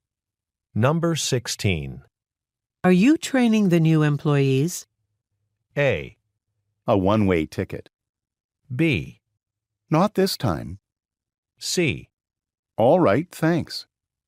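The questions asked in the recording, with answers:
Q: Are you training the new employees?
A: B: Not this time.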